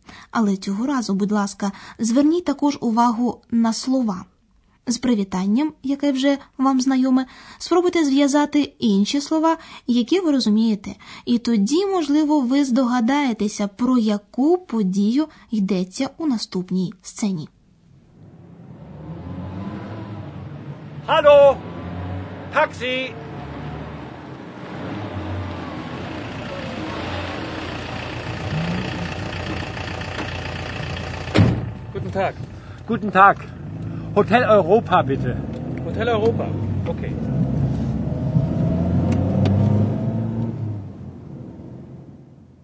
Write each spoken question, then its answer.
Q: І тоді, можливо, ви здогадаєтеся, про яку подію йдеться у наступній сцені.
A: Чоловік зупиняє на вулиці таксі і каже водієві, куди його відвести – до готелю.